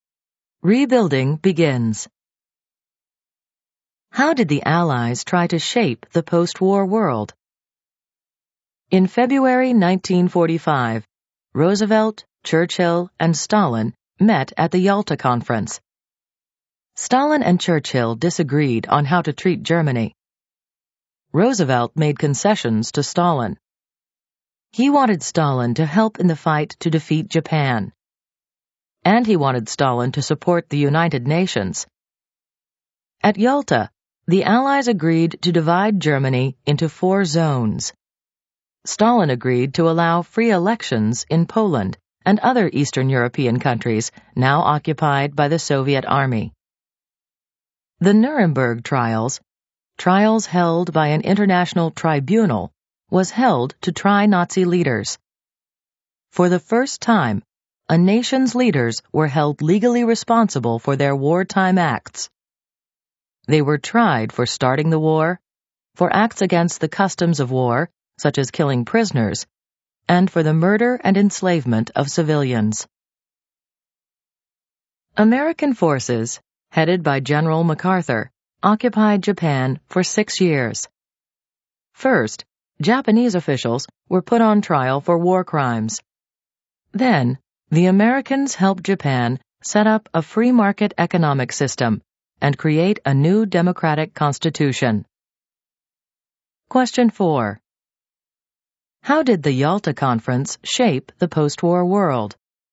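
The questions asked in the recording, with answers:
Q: How did the Yalta Conference shape the post-war world?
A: Germany was divided into four zones and Stalin agreed to free elections in Poland and Eastern Europe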